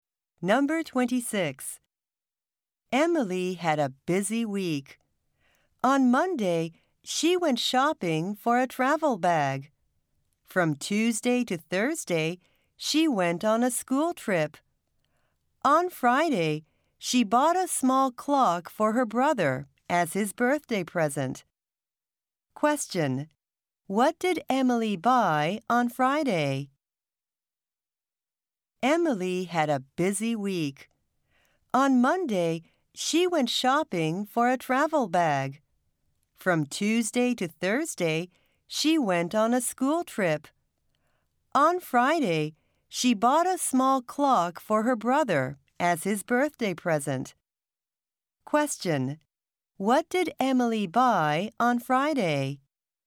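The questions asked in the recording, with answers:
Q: What did Emily buy on Friday?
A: A small clock for her brother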